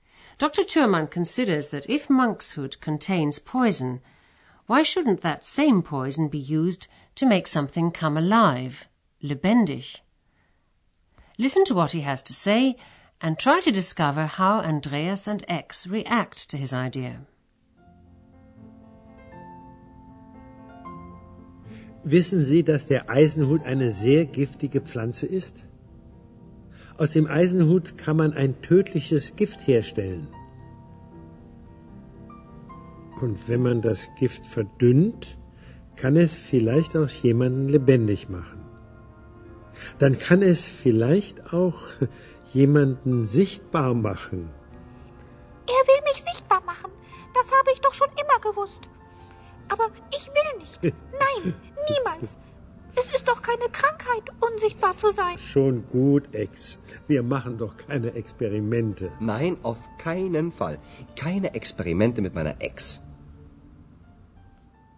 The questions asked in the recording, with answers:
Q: Listen to what he has to say and try to discover how Andreas and X react to his idea.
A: Andreas und Ex are not happy about his idea.